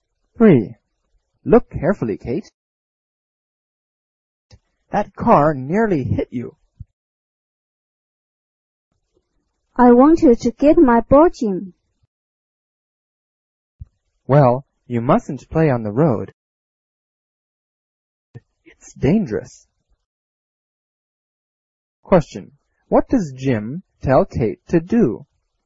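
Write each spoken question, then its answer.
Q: What does Jim tell Kate to do?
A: Not to play on the road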